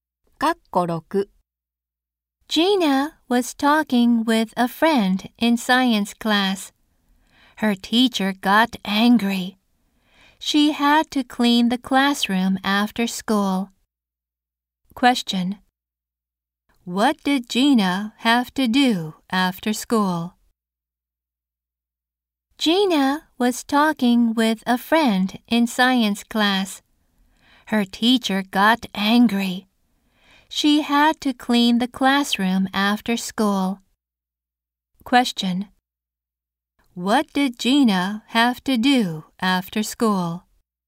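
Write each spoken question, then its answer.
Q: What did Gina have to do after school?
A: Clean the classroom.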